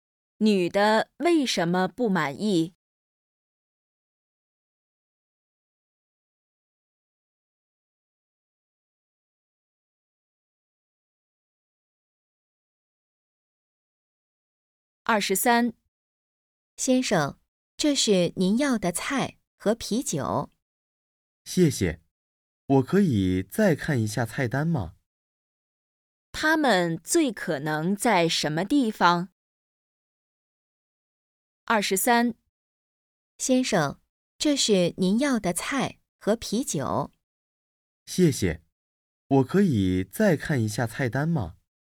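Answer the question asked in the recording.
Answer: 饭馆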